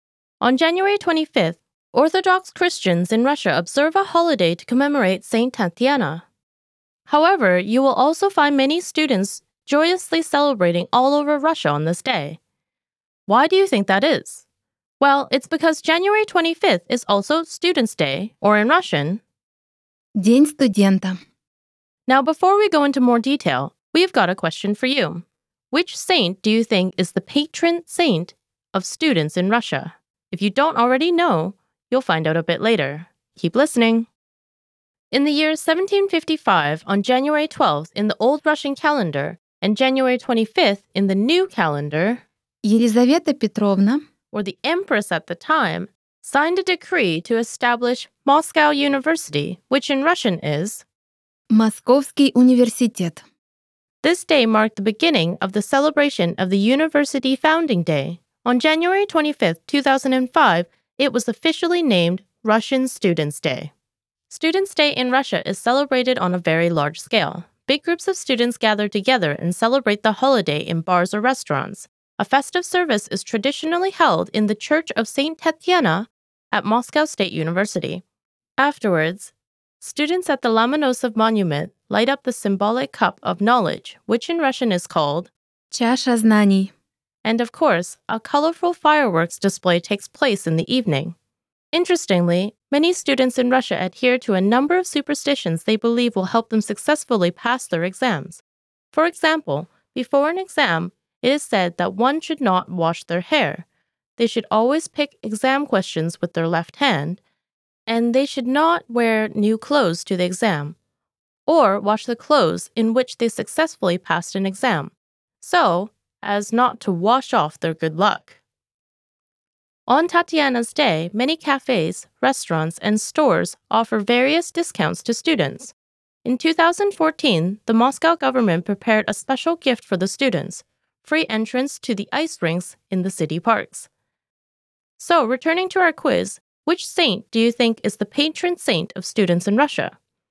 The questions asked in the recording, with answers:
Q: So, returning to our quiz, which saint do you think is the patron saint of students in Russia?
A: the patron saint of the students and teachers is none other than Saint Tatiana.